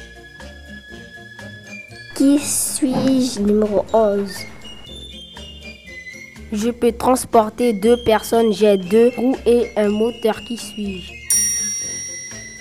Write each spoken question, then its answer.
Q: Qui suis-je?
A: une moto?